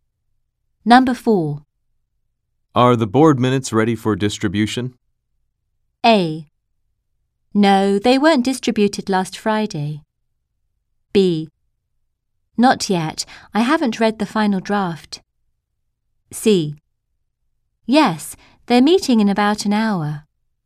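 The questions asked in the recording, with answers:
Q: Are the board minutes ready for distribution?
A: B: Not yet. I haven't read the final draft.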